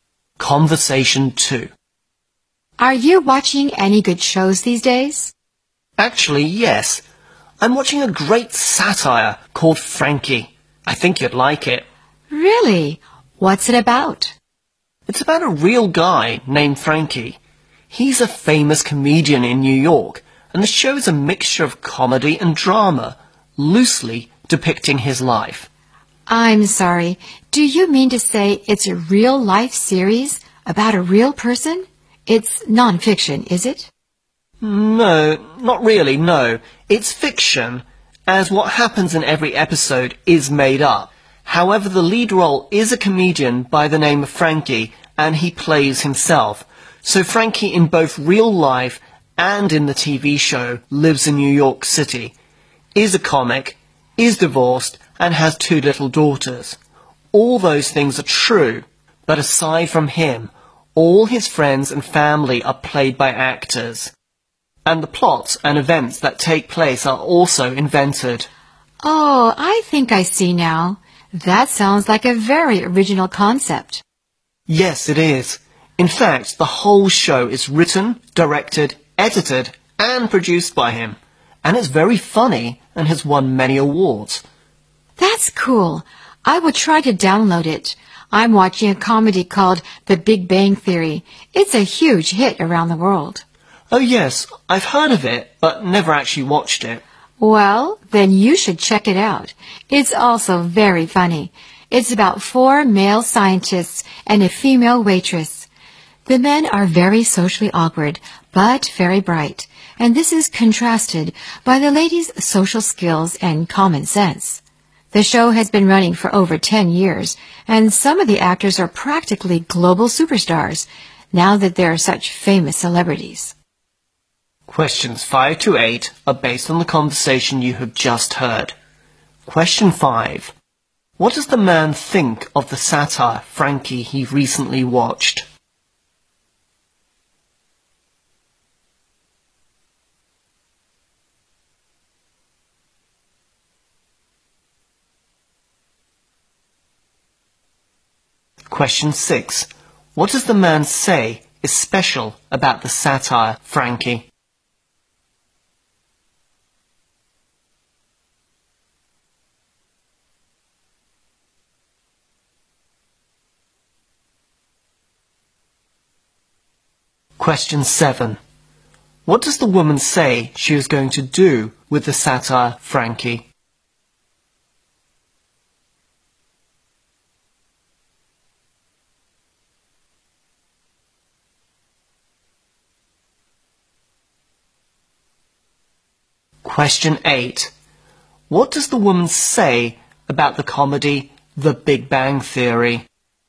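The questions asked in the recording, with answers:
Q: What does the man think of the satire, Frankie, he recently watched?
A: It is great, very funny and original

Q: What does the man say is special about the satire, Frankie?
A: The comedian plays himself and writes, directs, edits and produces the show

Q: What does the woman say she is going to do with the satire, Frankie?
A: Download it

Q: What does the woman say about the comedy The Big Bang Theory?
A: She has heard of it but never watched it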